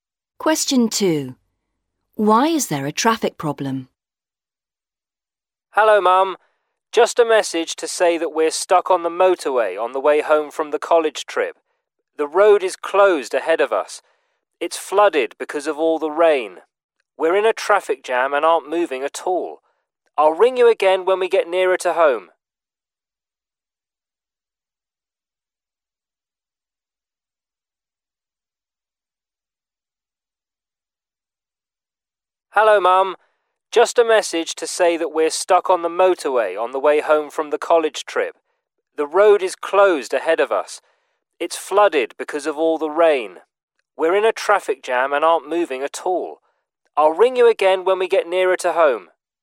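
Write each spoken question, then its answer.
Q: Why is there a traffic problem?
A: The road is flooded because of all the rain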